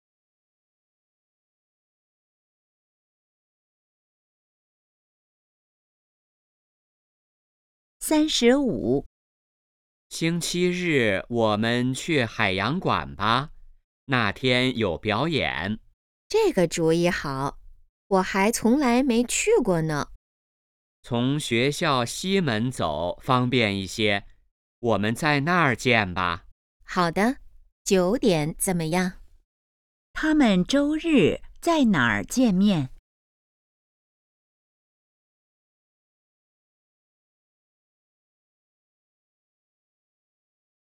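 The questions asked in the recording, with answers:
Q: 他们周日在哪儿见面?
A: 学校西门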